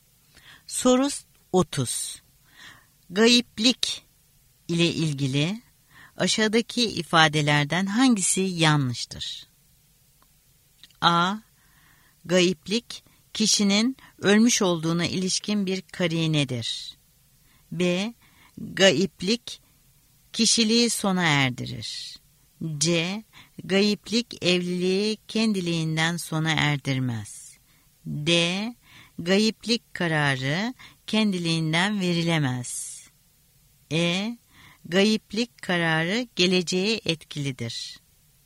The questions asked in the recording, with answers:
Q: Gayiplik ile ilgili aşağıdaki ifadelerden hangisi yanlıştır?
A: Doğru cevap E şıkkı. Gayiplik kararı geleceğe etkilidir.